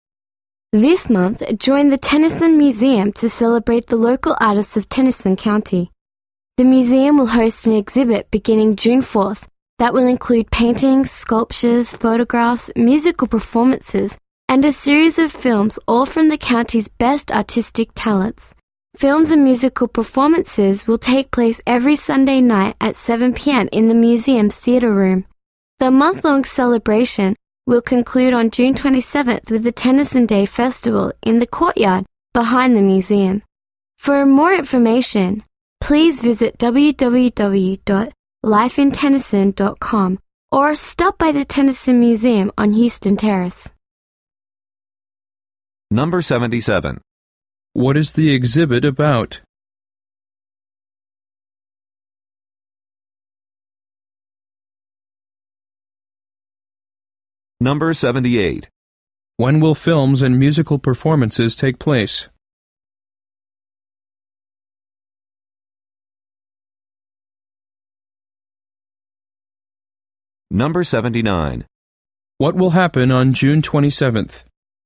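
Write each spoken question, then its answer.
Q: What is the exhibit about?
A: Local artists of Tennyson County

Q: When will films and musical performances take place?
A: Every Sunday night at 7 p.m.

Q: What will happen on June 27th?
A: The Tennyson Day Festival in the courtyard behind the museum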